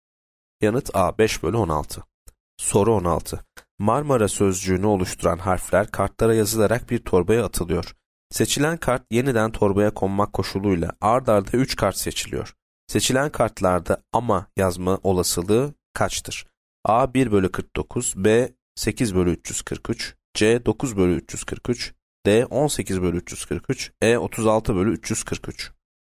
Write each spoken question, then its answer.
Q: Seçilen kartlarda ama yazma olasılığı kaçtır?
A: Yanıt D 18 bölü 343.